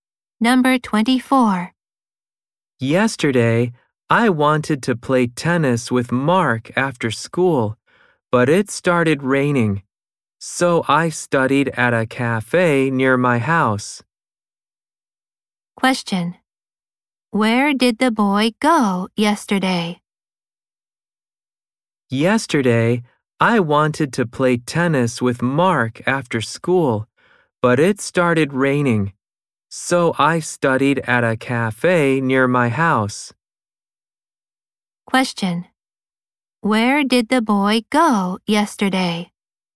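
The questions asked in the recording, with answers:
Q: Where did the boy go yesterday?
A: To a cafe near his house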